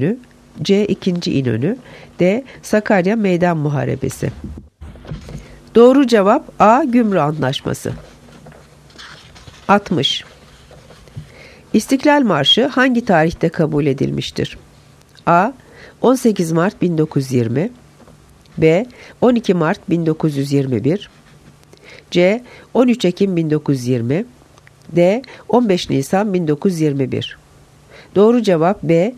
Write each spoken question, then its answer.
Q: İstiklal Marşı hangi tarihte kabul edilmiştir?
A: Doğru cevap B. 12 Mart 1921